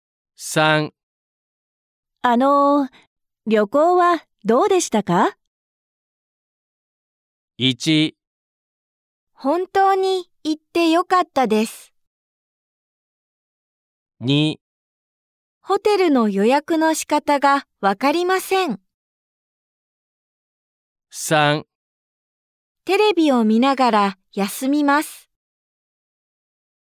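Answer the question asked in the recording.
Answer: 1: 本当に行ってよかったです。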